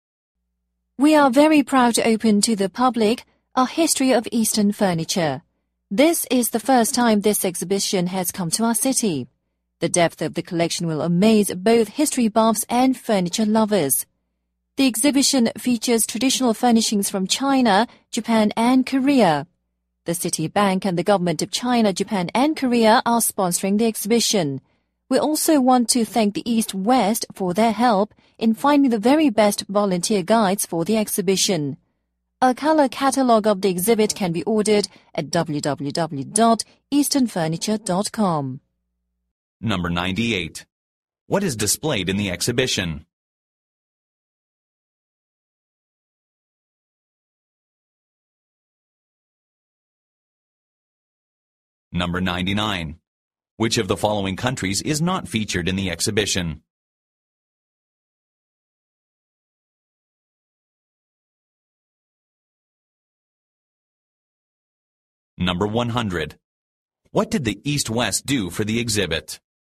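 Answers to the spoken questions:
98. Traditional furniture from China, Japan, and Korea
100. Helped find the best volunteer guides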